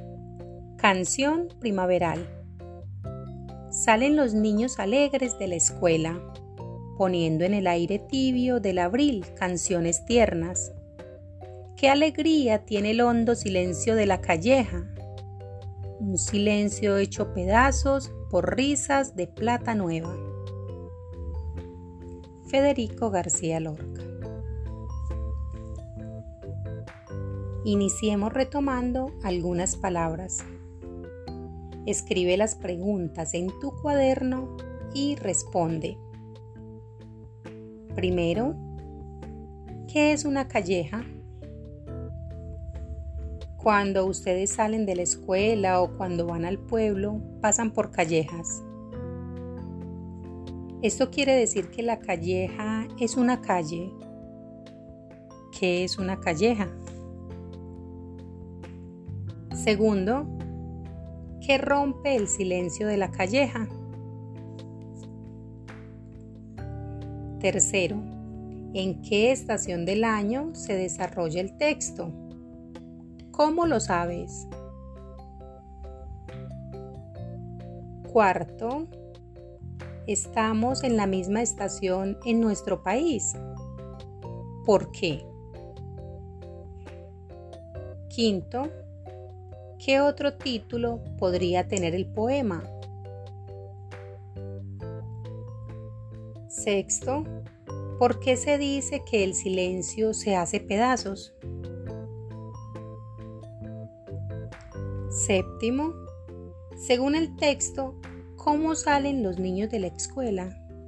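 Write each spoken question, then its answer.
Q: ¿qué rompe el silencio de la calleja?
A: Las risas de los niños (risas de plata nueva)

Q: ¿en qué estación del año se desarrolla el texto?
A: En primavera (en abril)

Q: según el texto, ¿cómo salen los niños de la escuela?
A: Alegres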